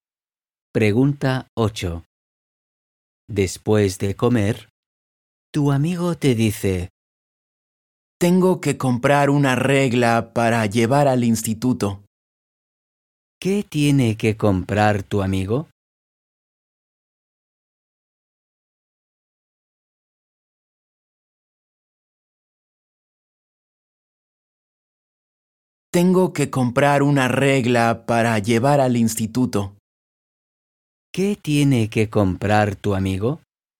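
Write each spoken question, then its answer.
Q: ¿Qué tiene que comprar tu amigo?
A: una regla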